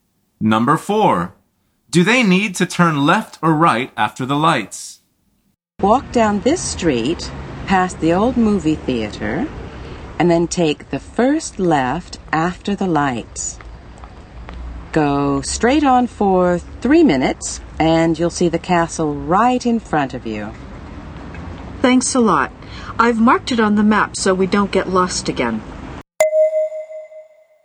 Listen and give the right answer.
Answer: The answer is left.